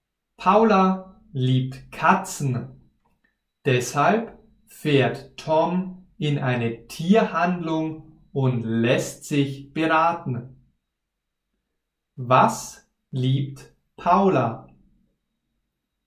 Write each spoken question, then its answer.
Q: Was liebt Paula?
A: Katzen. Sie liebt Katzen.